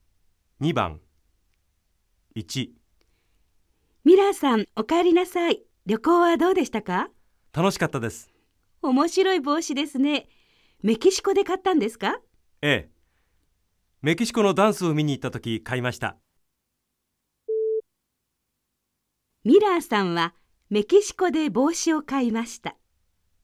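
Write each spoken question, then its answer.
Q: ミラーさんはメキシコで帽子を買いました。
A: ○(正しい)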